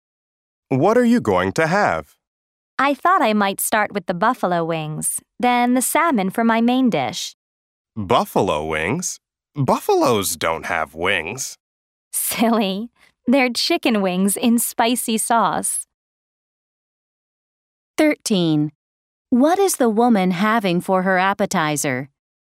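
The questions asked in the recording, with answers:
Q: What is the woman having for her appetizer?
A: Buffalo wings (chicken wings in spicy sauce)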